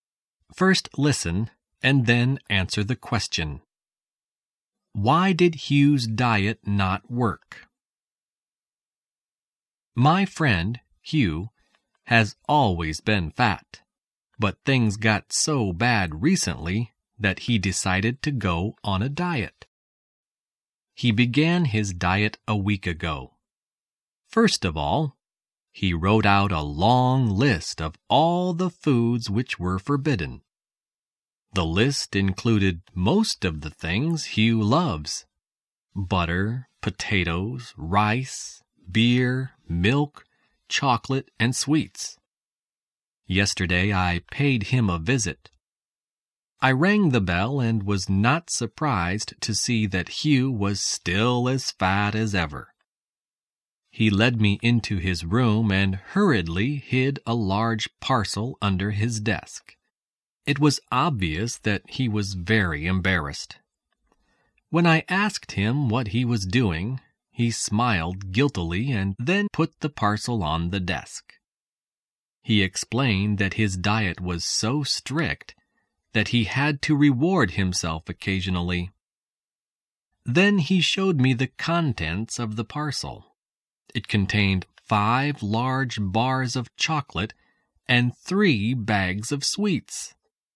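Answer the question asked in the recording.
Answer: He kept rewarding himself with chocolate and sweets.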